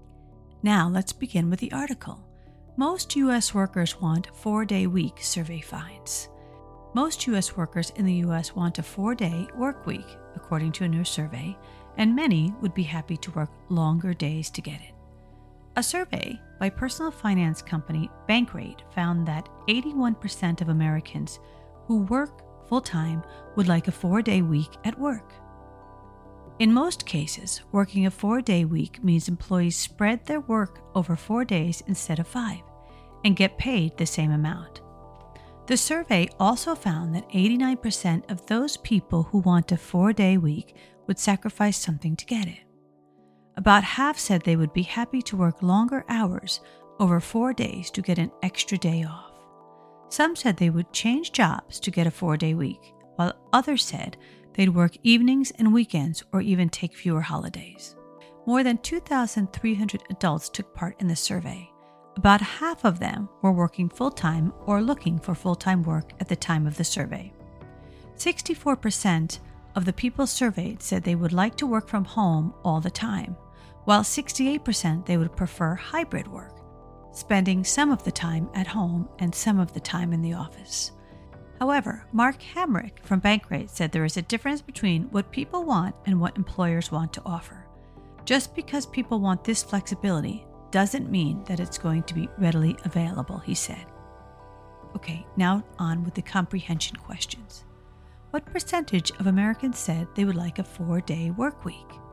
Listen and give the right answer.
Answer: 81% is the answer.